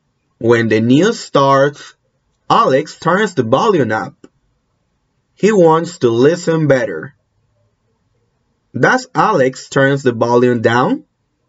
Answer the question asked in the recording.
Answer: No, no. Alex doesn't turn the volume down.